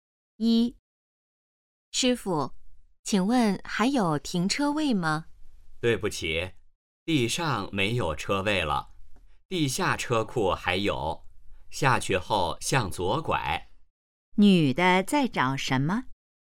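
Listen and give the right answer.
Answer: 停车位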